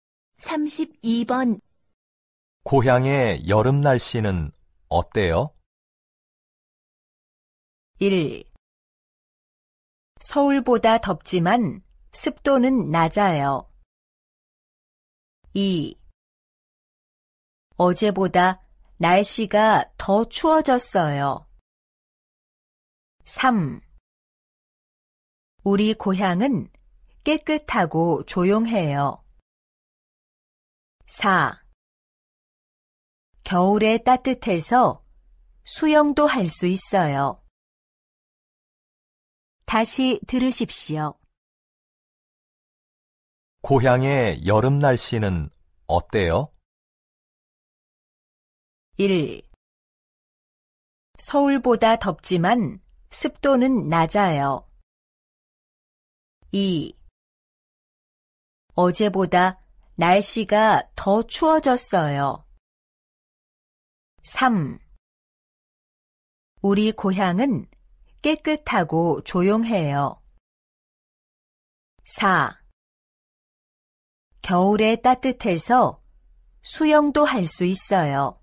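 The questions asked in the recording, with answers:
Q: 고향의 여름 날씨는 어때요?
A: 1: 서울보다 덥지만 습도는 낮아요.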